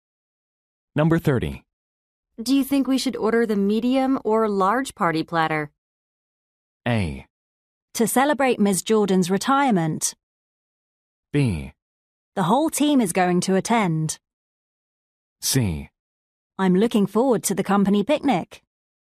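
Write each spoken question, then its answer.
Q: Do you think we should order the medium or large party platter?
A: B: The whole team is going to attend.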